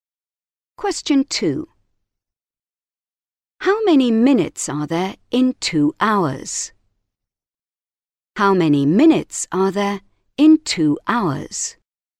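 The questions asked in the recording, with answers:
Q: How many minutes are there in 2 hours?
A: 120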